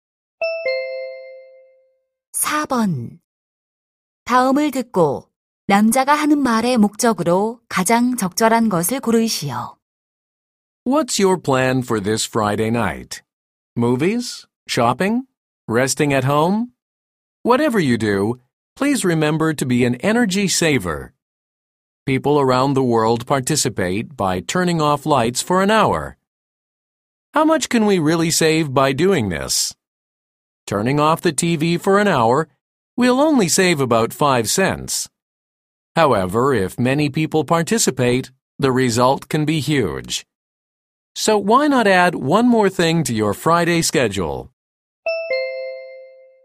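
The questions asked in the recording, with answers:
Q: 다음을 듣고 남자가 하는 말의 목적으로 가장 적절한 것을 고르시오.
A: 금요일 밤 한 시간 동안 불을 끄는 에너지 절약 행사 참여 권장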